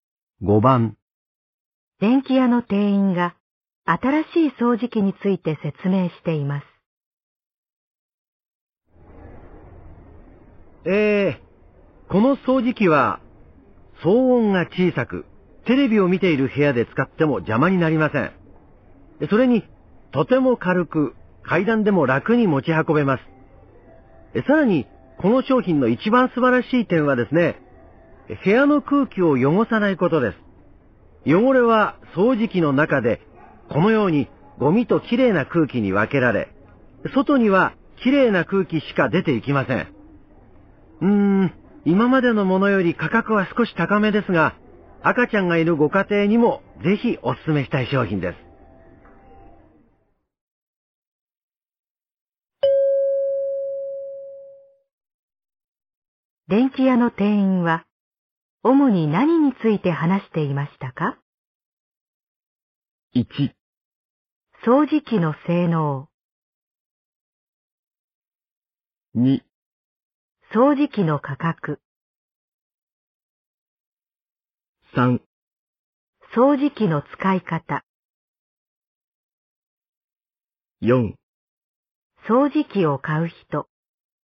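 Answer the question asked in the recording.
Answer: 1: 掃除機の性能。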